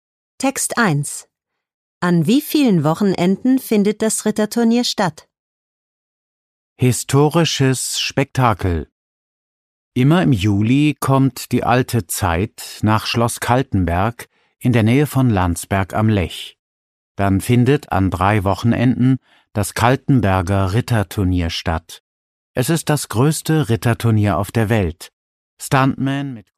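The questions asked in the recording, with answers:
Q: An wie vielen Wochenenden findet das Ritterturnier statt?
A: An 3 Wochenenden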